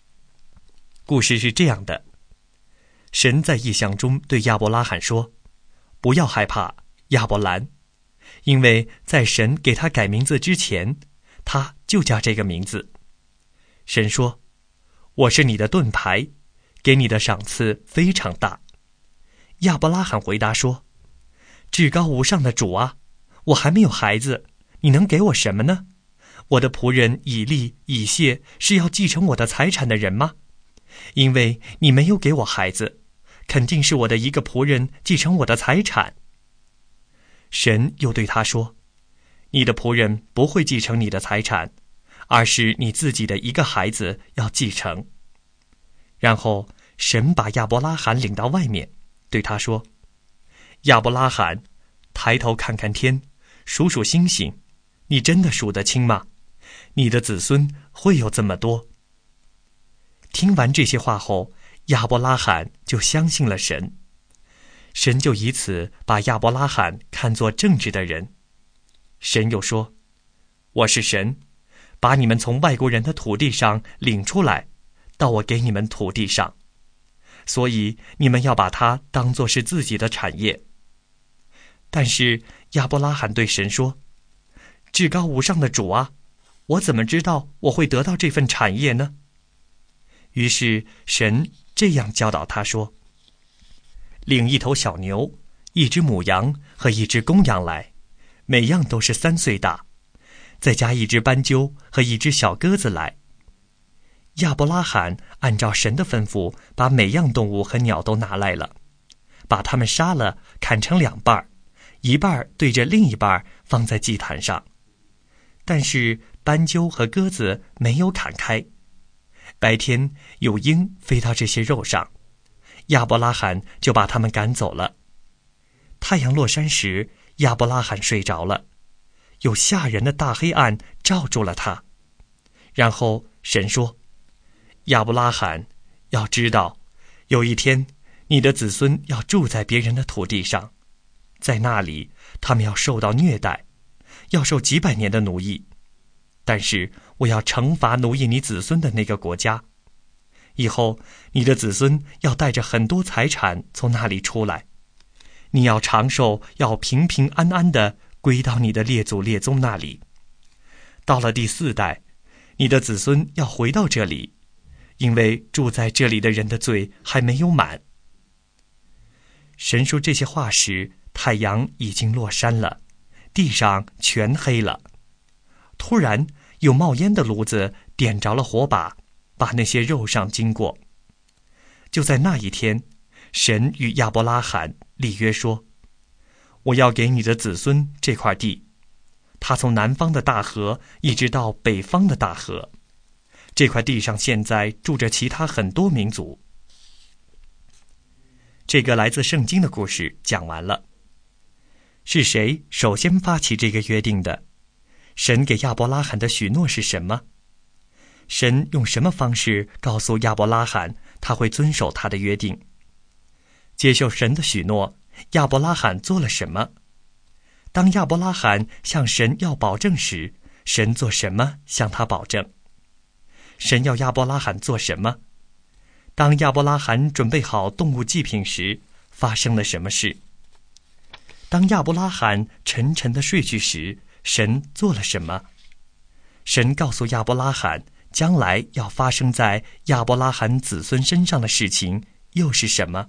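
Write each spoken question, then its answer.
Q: 神给亚伯拉罕的许诺是什么?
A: 他自己的孩子要继承他的财产,他的子孙会像天上的星星一样多,并且会得到这块土地

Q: 接受神的许诺,亚伯拉罕做了什么?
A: 他相信了神

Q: 神要亚伯拉罕做什么?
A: 带来一头小牛、一只母羊、一只公羊(都是三岁大),以及一只斑鸠和一只小鸽子

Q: 当亚伯拉罕准备好动物祭品时,发生了什么事?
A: 有鹰飞到肉上,亚伯拉罕把它们赶走了

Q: 神告诉亚伯拉罕 将来要发生在亚伯拉罕子孙身上的事情又是什么?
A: 他们要住在别人的土地上,受几百年的虐待和奴役,以后会带着很多财产出来,到第四代时回到这里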